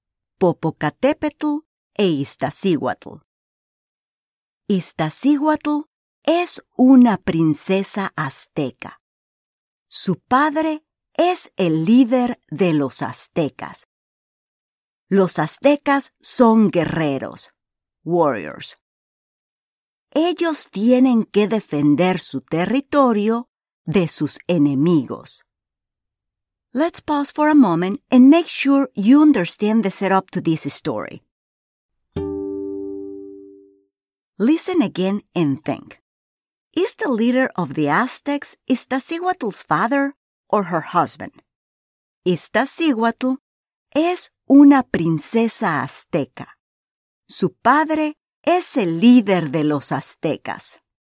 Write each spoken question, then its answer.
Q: Listen again and think. Is the leader of the Aztecs Iztaccíhuatl's father or her husband?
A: Muy bien. Her father.